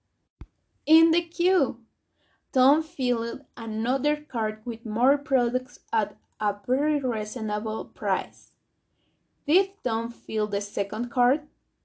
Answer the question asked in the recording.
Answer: Yes, Tom filled another cart, a second cart.